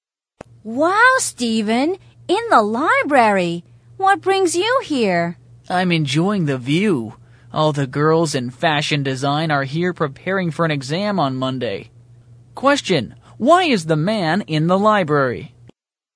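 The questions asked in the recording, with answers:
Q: why is the man in the library?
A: To look at the girls from fashion design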